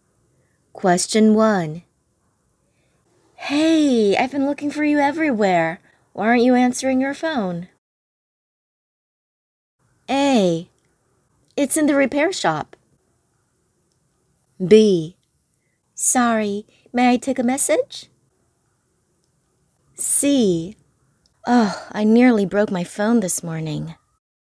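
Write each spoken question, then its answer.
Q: Hey, I've been looking for you everywhere. Why aren't you answering your phone?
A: A: It's in the repair shop.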